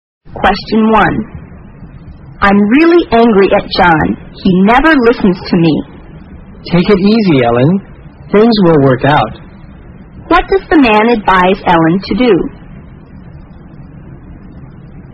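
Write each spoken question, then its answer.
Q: What does the man advise Ellen to do?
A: Calm down; things will work out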